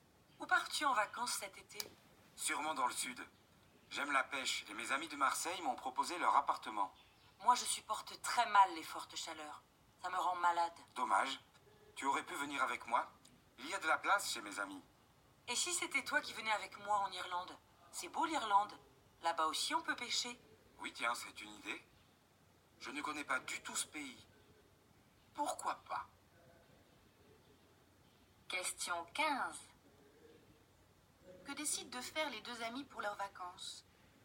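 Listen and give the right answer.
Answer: Partir ensemble en Irlande (pour pêcher)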